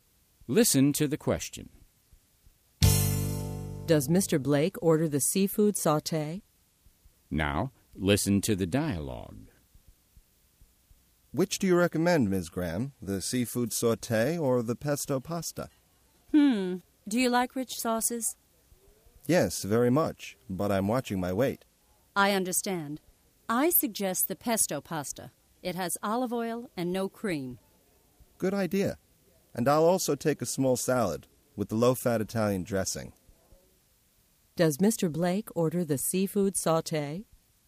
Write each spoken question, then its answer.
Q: Does Mr. Blake order the seafood sauté?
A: No, he doesn't. He orders the pesto pasta.